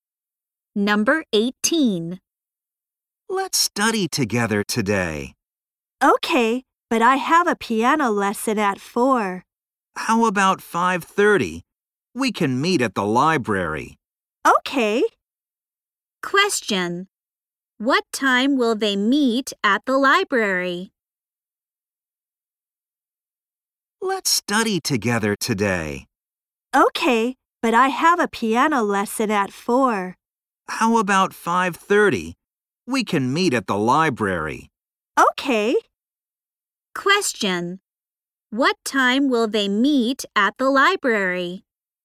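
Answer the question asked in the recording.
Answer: At 5:30.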